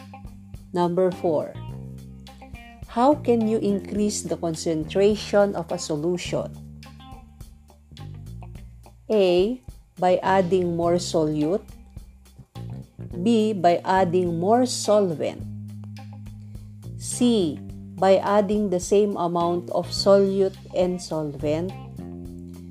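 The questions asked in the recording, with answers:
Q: How can you increase the concentration of a solution?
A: A: By adding more solute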